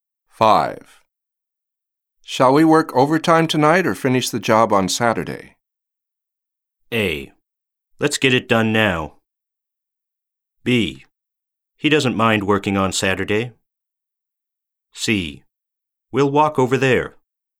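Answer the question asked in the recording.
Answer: A: Let's get it done now.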